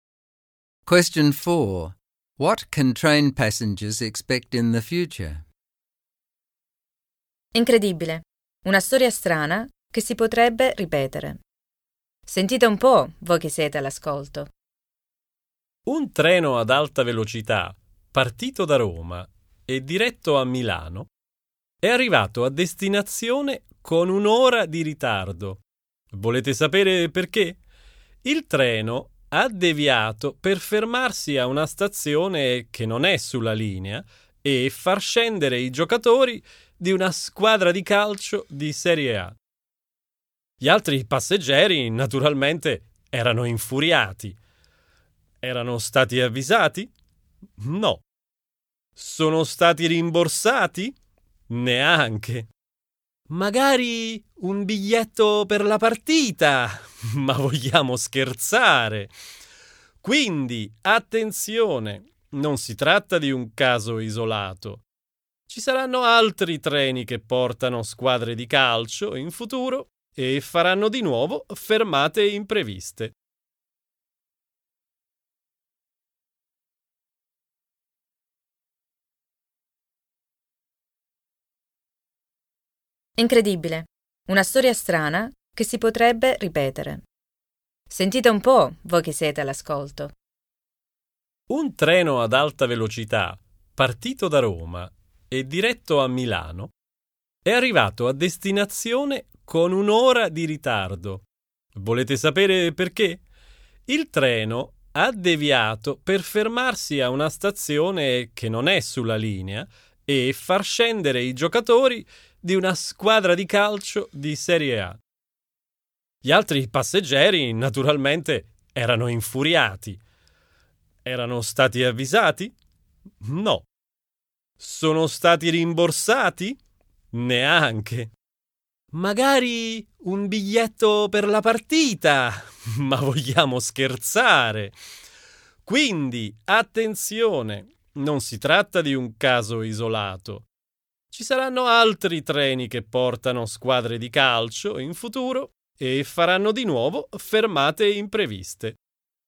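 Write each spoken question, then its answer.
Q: What can train passengers expect in the future?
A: More trains carrying football teams will make unexpected stops, causing delays.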